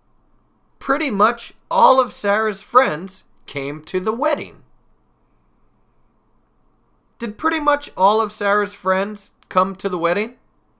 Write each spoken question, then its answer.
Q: Did pretty much all of Sarah's friends come to the wedding?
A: Yes, yes, that's true. Pretty much all of Sarah's friends came to the wedding.